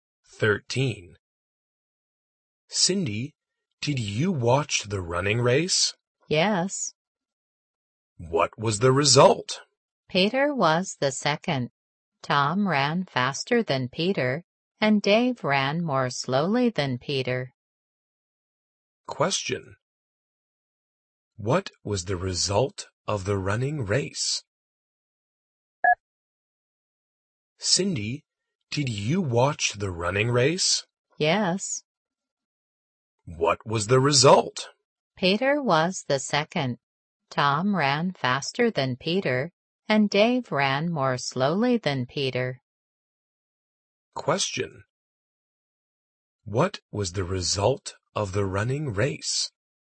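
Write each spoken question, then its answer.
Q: What was the result of the running race?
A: Tom was first, Peter second, Dave third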